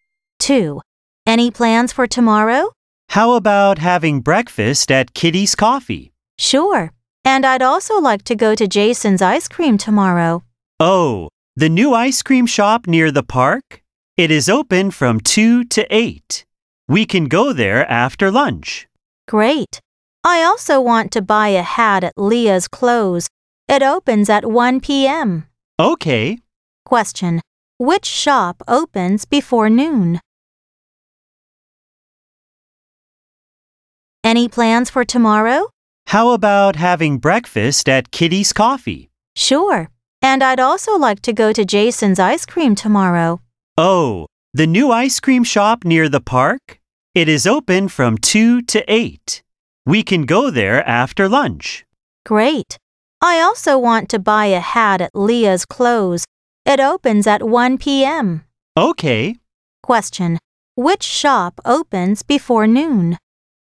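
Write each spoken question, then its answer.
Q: Which shop opens before noon?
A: Kitty's Coffee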